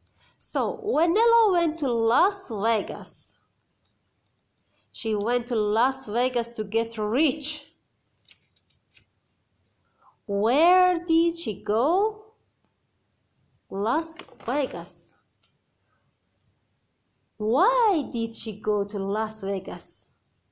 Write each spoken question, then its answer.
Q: Why did she go to Las Vegas?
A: To get rich.